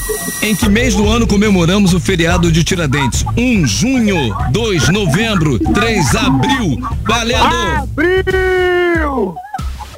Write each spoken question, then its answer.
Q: Em que mês do ano comemoramos o feriado de Tiradentes?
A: Abril!